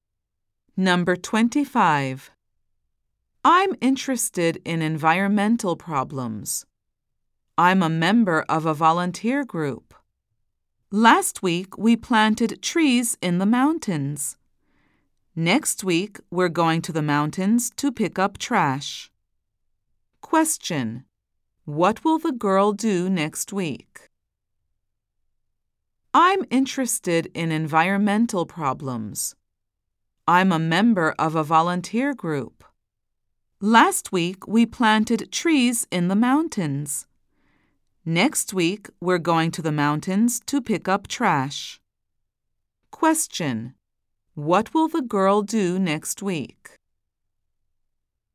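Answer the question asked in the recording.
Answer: Go to the mountains to pick up trash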